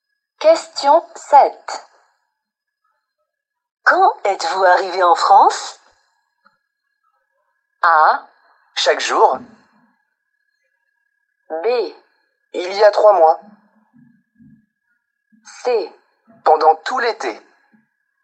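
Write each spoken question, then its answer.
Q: Quand êtes-vous arrivé en France?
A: B: Il y a 3 mois.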